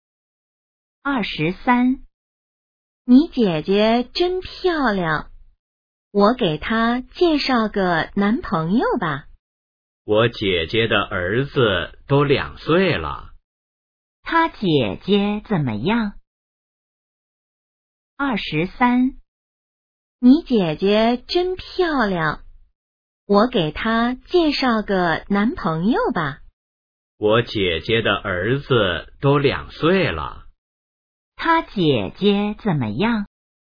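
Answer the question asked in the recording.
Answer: 已经结婚了,有一个2岁的儿子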